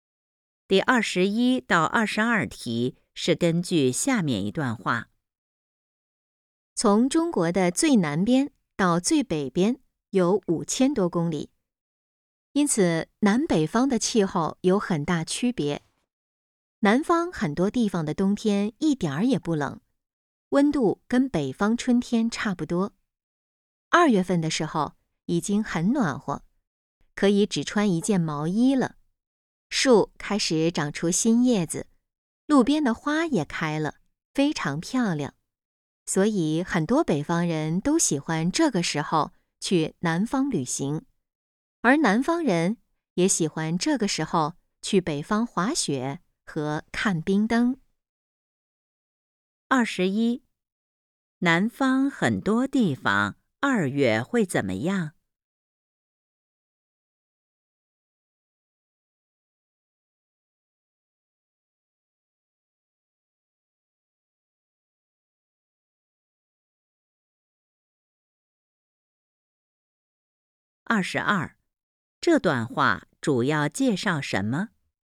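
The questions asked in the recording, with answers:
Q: 南方很多地方二月会怎么样?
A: 已经很暖和,只穿一件毛衣就行

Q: 这段话主要介绍什么?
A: 中国南北方气候的区别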